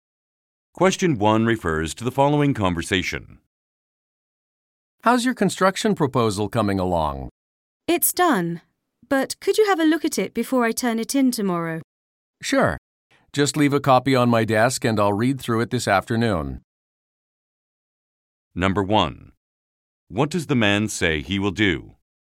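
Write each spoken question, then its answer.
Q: What does the man say he will do?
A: Read through the proposal this afternoon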